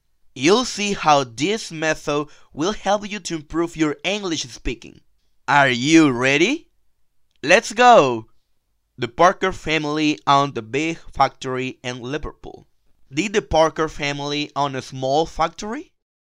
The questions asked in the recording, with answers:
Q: Did the Parker family own a small factory?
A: No, they didn't own a small factory.